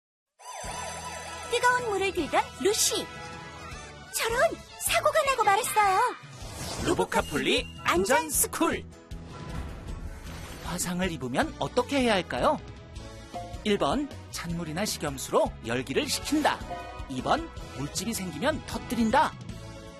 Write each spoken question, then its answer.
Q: 화상을 입으면 어떻게 해야 할까요?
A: 정답은 1번. 찬물이나 식염수로 열기를 식히고 깨끗한 거즈로 상처 부위를 감싸줘요.